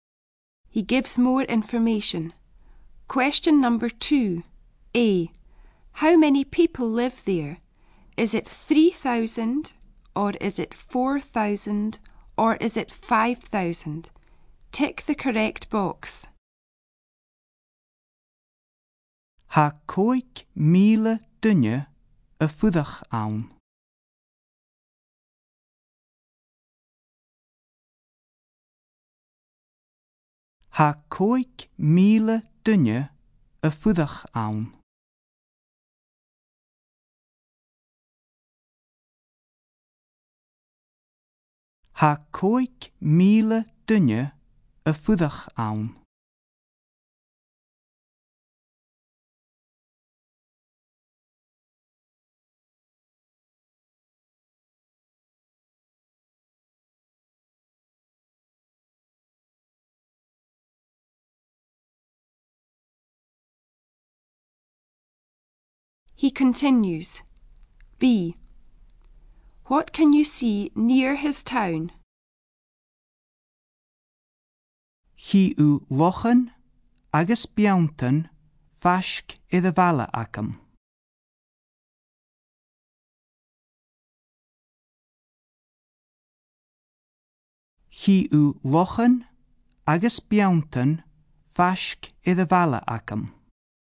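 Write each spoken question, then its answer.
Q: How many people live there?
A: 5,000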